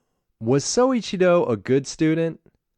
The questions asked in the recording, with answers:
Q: Was Soichiro a good student?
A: No, he wasn't a good student.